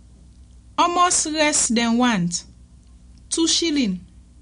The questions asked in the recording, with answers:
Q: Almost less than want.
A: Then want 2 shilling yon.